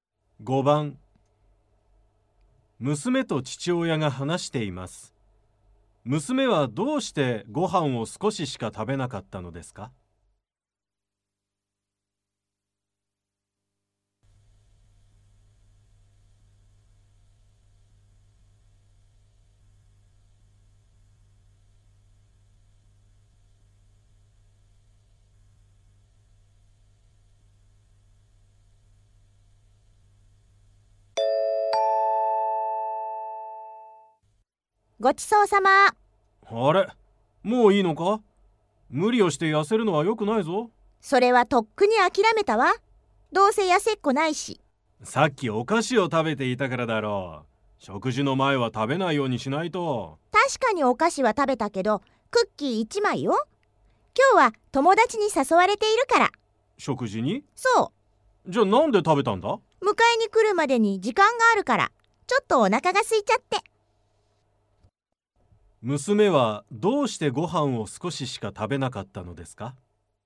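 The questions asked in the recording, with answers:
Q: 娘はどうしてご飯を少ししか食べなかったのですか?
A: このあと友達と食事に行くから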